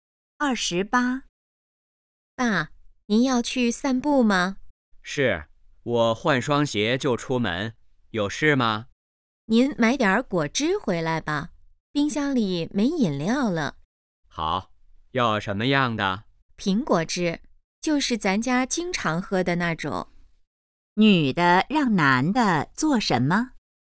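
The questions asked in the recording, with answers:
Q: 女的让男的做什么?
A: 买苹果汁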